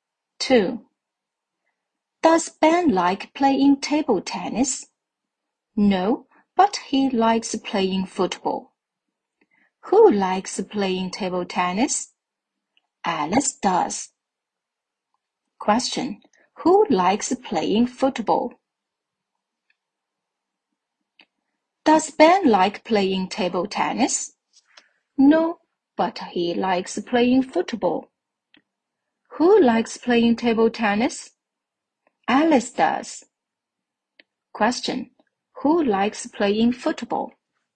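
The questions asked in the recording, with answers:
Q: Who likes playing football?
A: Ben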